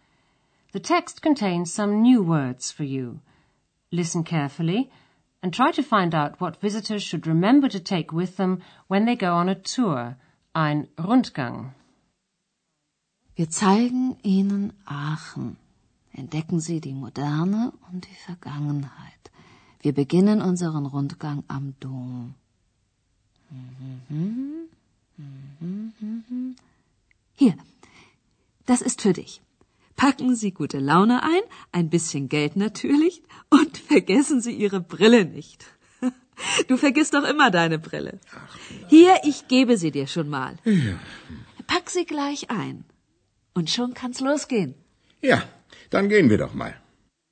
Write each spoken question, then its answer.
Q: Listen carefully and try to find out what visitors should remember to take with them when they go on a tour, ein Rundgang.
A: Visitors are reminded not to forget their glasses